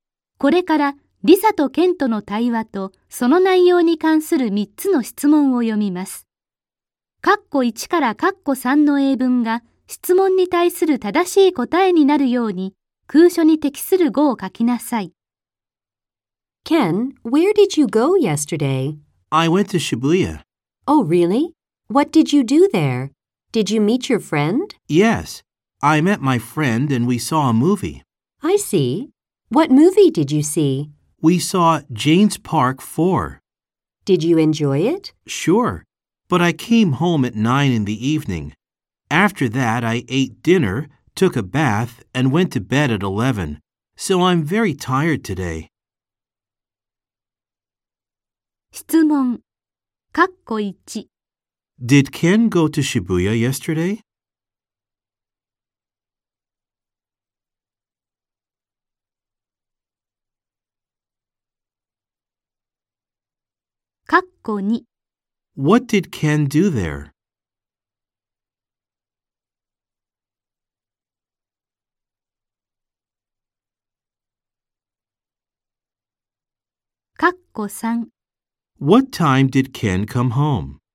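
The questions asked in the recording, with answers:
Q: Did Ken go to Shibuya yesterday?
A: Yes, he did.

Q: What did Ken do there?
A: He met his friend and saw a movie.

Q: What time did Ken come home?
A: At 9 in the evening.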